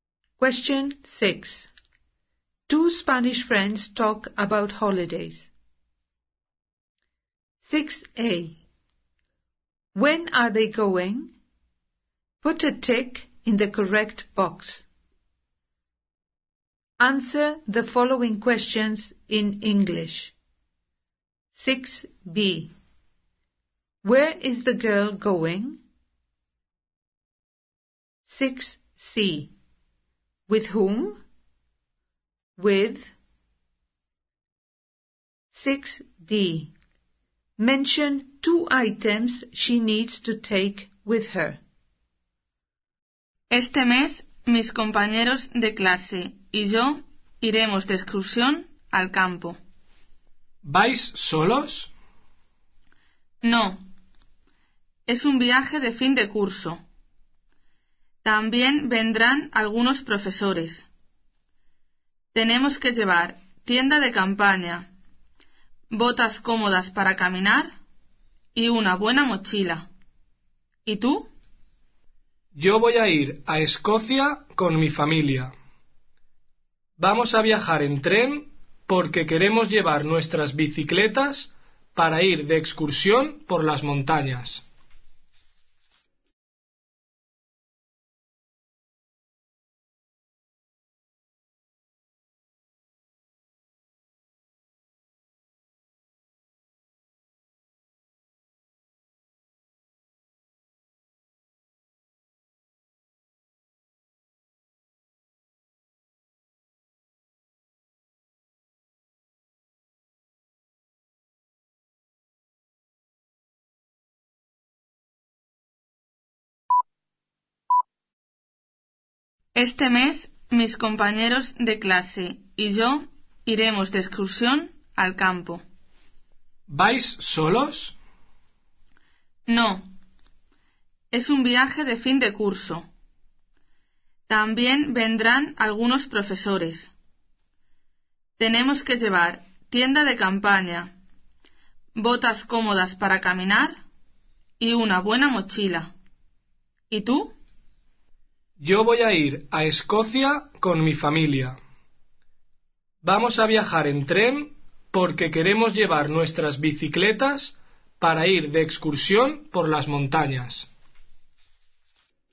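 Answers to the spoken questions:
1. To the countryside
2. Her classmates and some teachers
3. A tent, comfortable walking boots, a good rucksack (any two)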